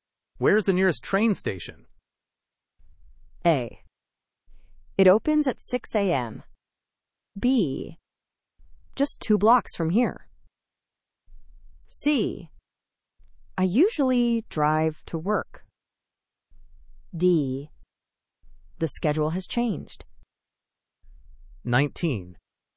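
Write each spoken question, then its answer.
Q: Where's the nearest train station?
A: B: Just 2 blocks from here.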